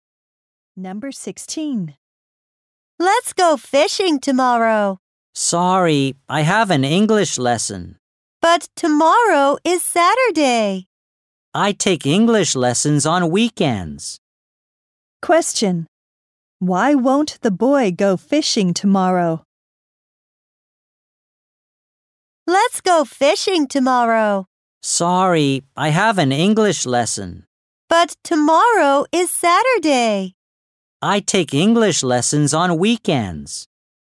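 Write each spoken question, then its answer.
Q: Question. Why won't the boy go fishing tomorrow?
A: He has an English lesson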